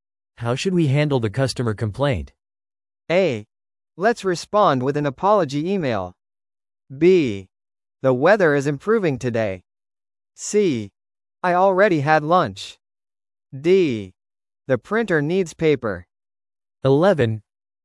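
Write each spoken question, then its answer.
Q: How should we handle the customer complaint?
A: A: Let's respond with an apology email.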